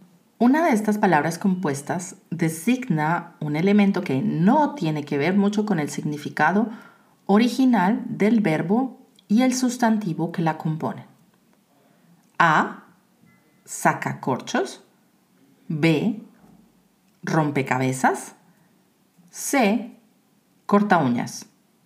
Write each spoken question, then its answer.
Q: Una de estas palabras compuestas designa un elemento que no tiene que ver mucho con el significado original del verbo y el sustantivo que la compone?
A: La respuesta correcta es B.